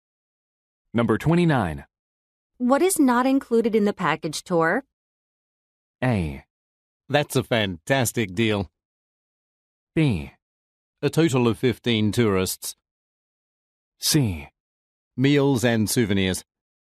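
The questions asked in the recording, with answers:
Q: What is not included in the package tour?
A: C: Meals and souvenirs.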